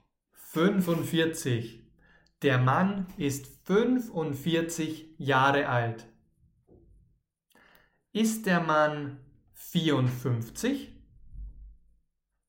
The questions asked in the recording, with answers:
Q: Ist der Mann 54?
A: Nein. Der Mann ist 45 Jahre alt.